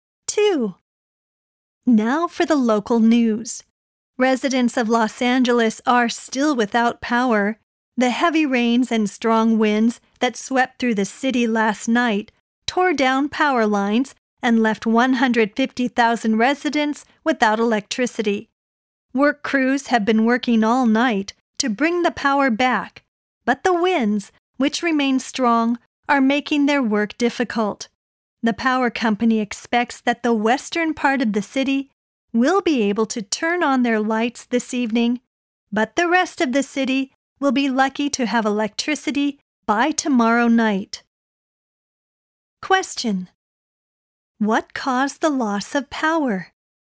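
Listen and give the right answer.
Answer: Heavy rains and strong winds that tore down power lines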